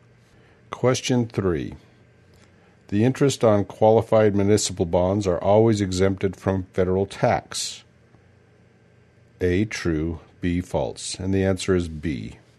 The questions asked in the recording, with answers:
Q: The interest on qualified municipal bonds are always exempted from federal tax.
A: And the answer is B.